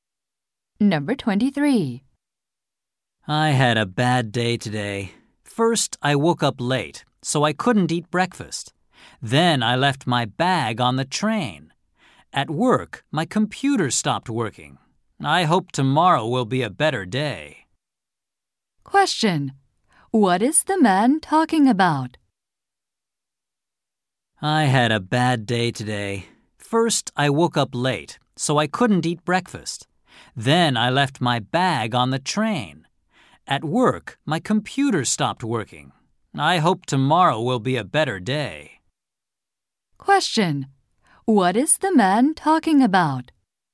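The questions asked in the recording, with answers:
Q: What is the man talking about?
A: His bad day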